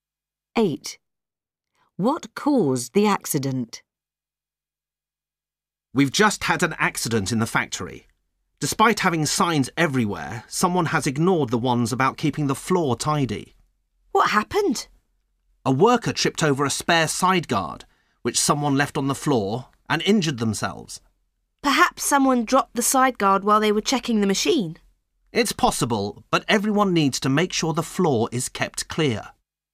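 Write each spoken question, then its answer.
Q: What caused the accident?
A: A spare side guard left on the floor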